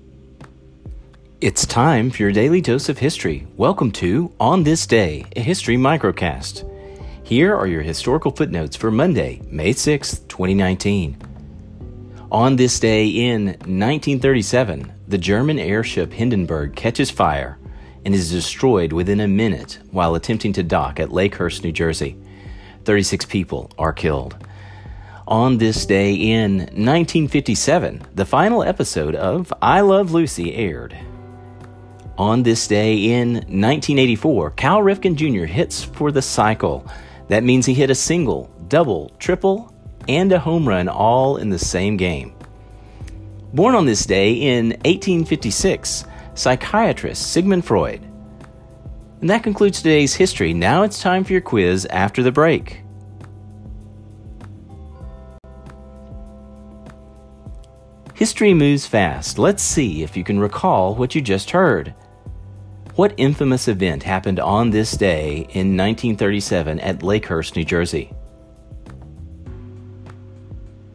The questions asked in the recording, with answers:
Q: What infamous event happened on this day in 1937 at Lakehurst, New Jersey?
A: the Hindenburg disaster.